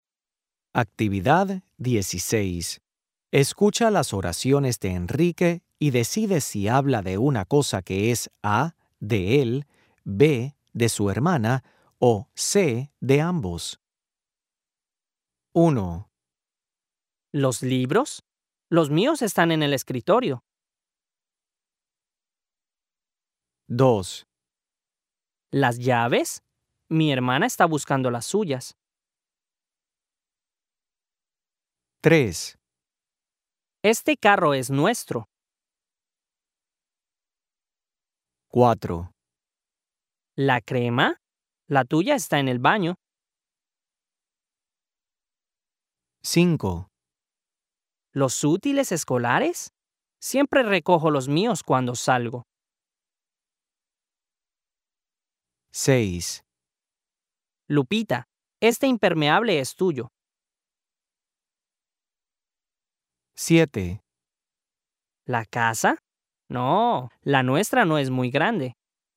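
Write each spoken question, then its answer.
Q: ¿Los libros? Los míos están en el escritorio.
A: A: de él

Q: ¿Las llaves? Mi hermana está buscando las suyas.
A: B: de su hermana

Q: Este carro es nuestro.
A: C: de ambos

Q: ¿Los útiles escolares? Siempre recojo los míos cuando salgo.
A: A: de él

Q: ¿La casa? No, la nuestra no es muy grande.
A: C: de ambos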